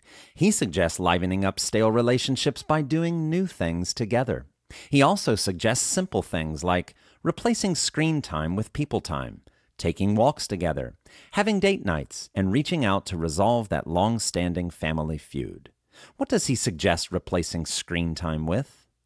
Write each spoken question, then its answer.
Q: What does he suggest replacing screen time with?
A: He suggests replacing screen time with people time.